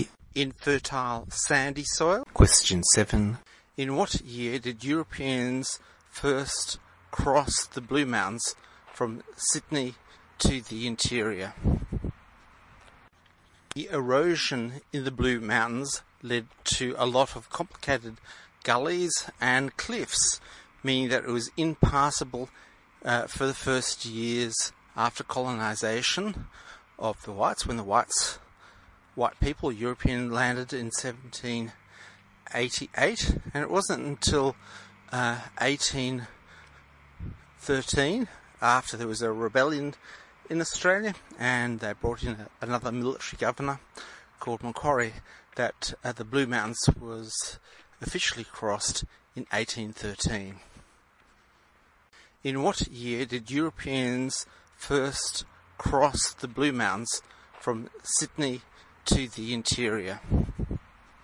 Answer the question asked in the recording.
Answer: C. 1813.